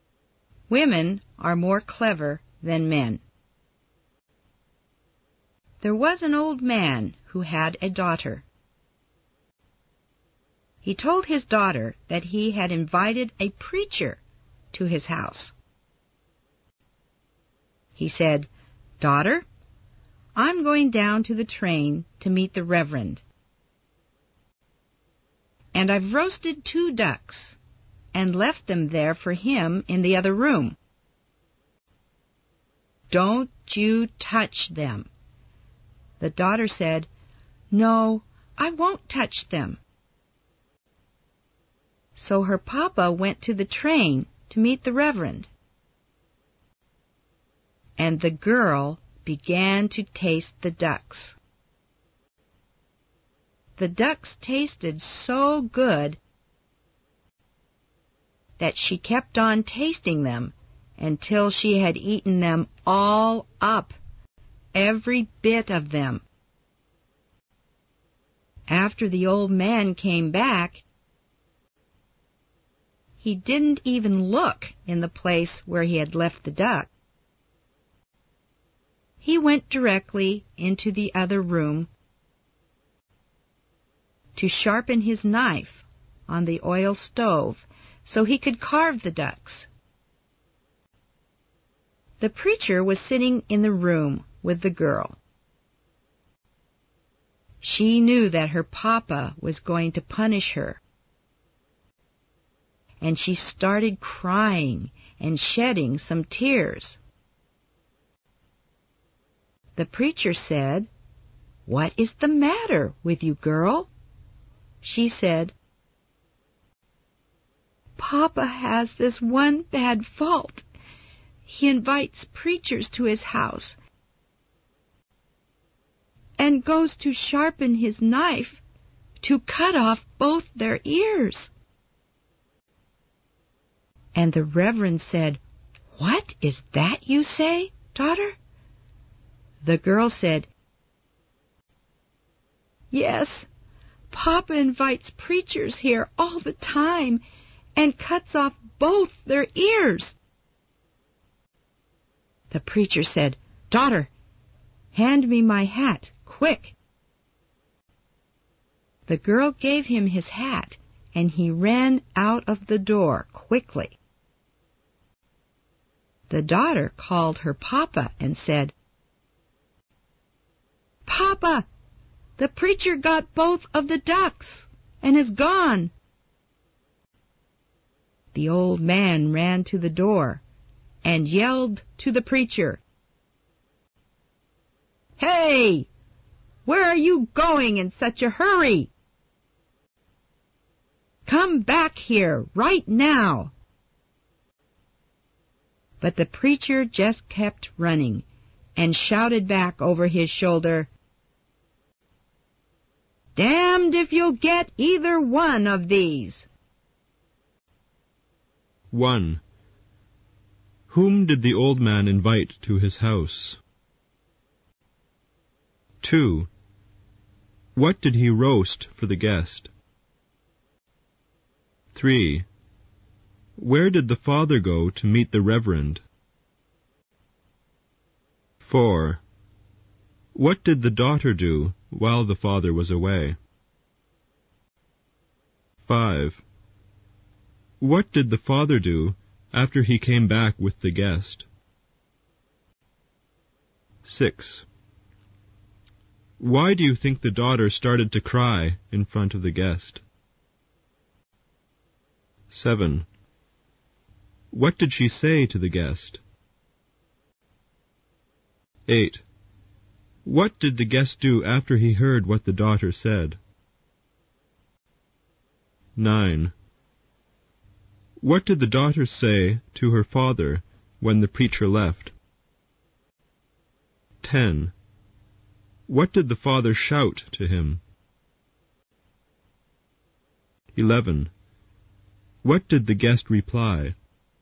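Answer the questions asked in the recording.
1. A preacher (the Reverend)
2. Two ducks
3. To the train
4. She tasted the ducks until she had eaten them all
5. He went into the other room to sharpen his knife to carve the ducks
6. She knew her papa was going to punish her
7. That her papa invites preachers and sharpens his knife to cut off both their ears
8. He asked for his hat and ran out the door
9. The preacher got both of the ducks and is gone
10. Where are you going in such a hurry? Come back here right now
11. Damned if you'll get either one of these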